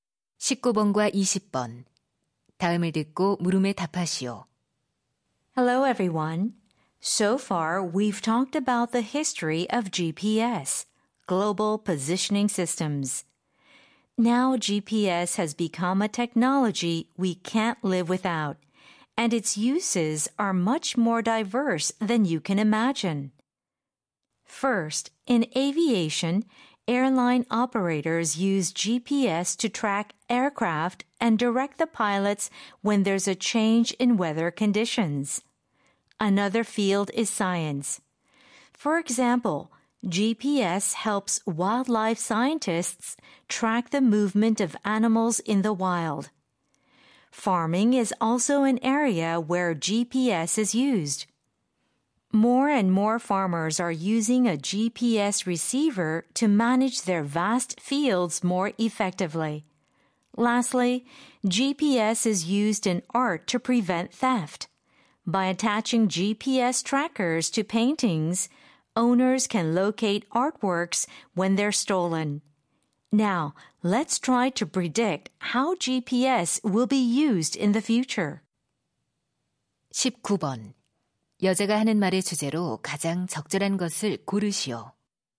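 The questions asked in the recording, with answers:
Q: 여자가 하는 말의 주제로 가장 적절한 것을 고르시오.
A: 다양한 분야에서의 GPS 활용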